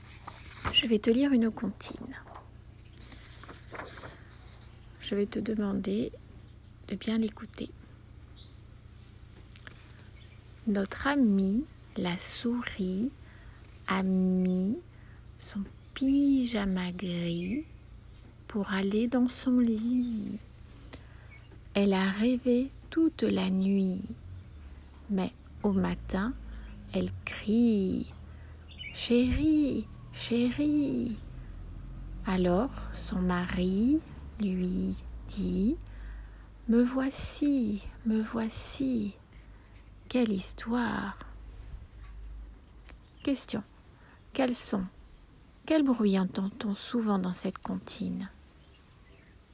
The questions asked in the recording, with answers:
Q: Quel son ? Quel bruit entend-on souvent dans cette comptine ?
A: Oui, on entend le son « i ».